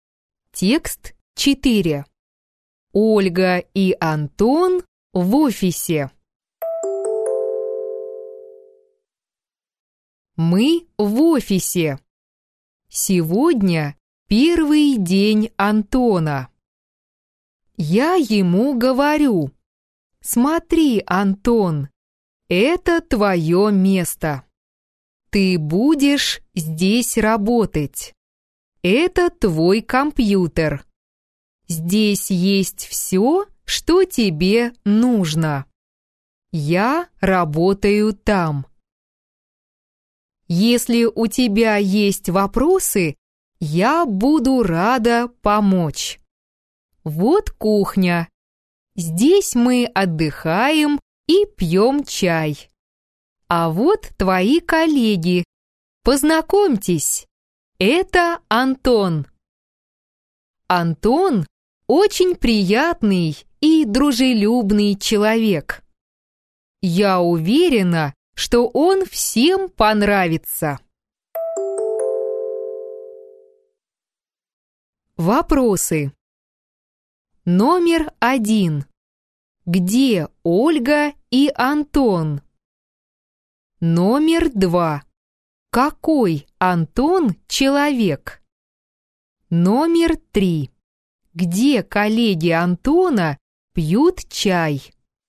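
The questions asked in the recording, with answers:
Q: Где Ольга и Антон?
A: В офисе

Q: Какой Антон человек?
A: Очень приятный и дружелюбный

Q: Где коллеги Антона пьют чай?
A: На кухне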